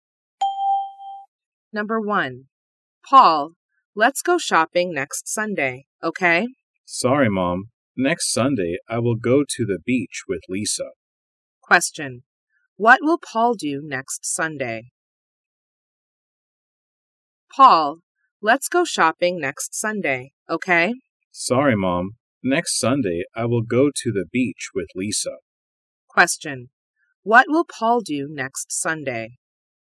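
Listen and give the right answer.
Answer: He will go to the beach with Lisa.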